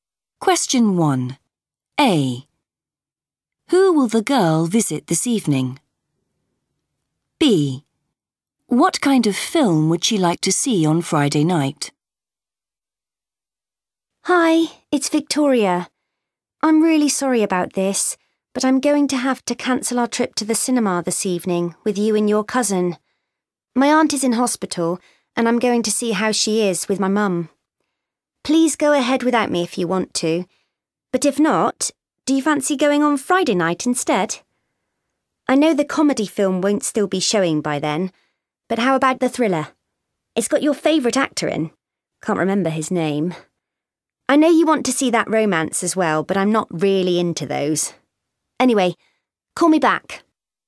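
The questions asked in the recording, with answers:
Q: Who will the girl visit this evening?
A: her aunt

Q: What kind of film would she like to see on Friday night?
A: a thriller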